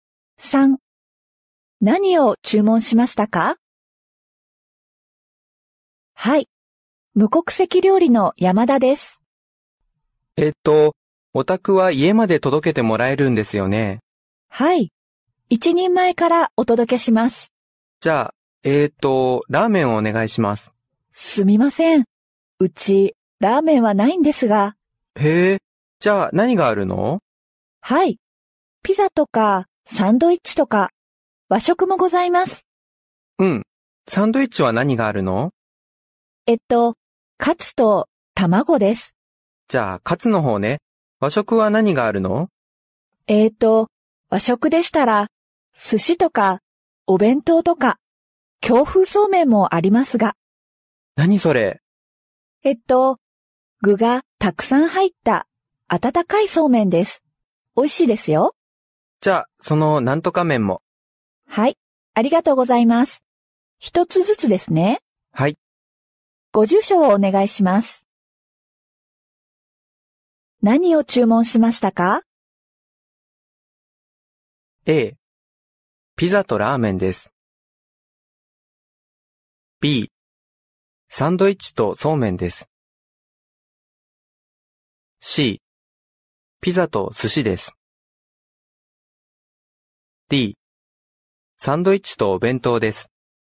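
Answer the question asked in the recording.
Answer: B: サンドイッチとそうめんです。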